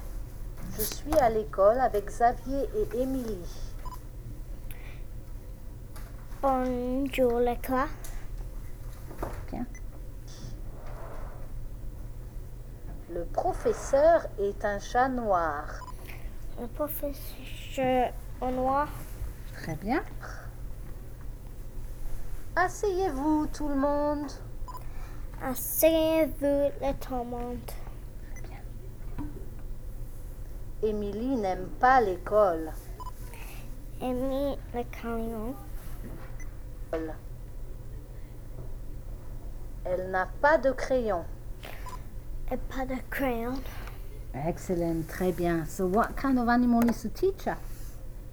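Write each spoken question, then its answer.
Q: So what kind of animal is the teacher?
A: A black cat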